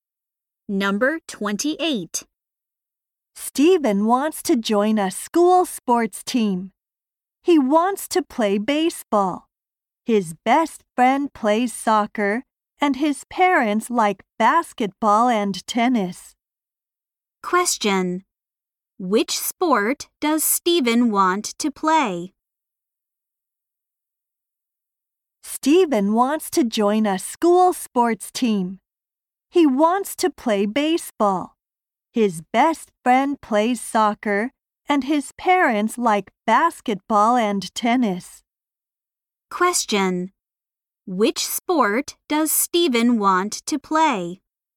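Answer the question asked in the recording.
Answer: Baseball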